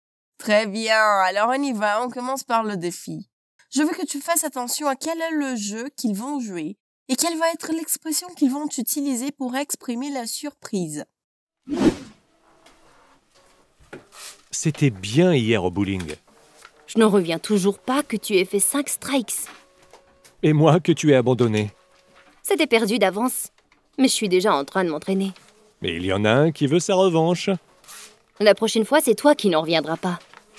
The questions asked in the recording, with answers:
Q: quel est le jeu qu'ils vont jouer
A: Le jeu qu'ils ont joué, c'est le bowling.

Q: quelle va être l'expression qu'ils vont utiliser pour exprimer la surprise.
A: L'expression est ne pas en revenir